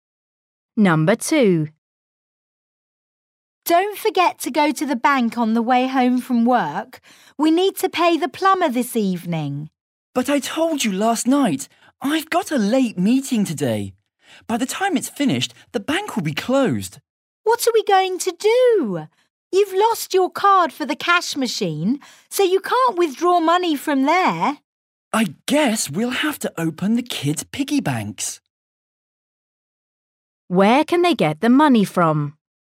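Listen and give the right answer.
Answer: the kids' piggy banks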